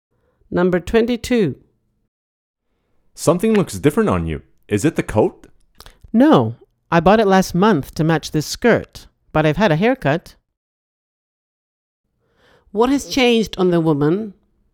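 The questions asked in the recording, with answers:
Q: What has changed on the woman?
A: Her hair (she had a haircut)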